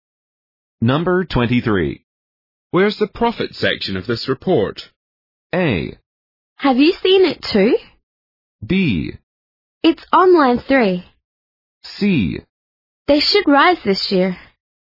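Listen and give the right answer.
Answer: B: It's on line 3.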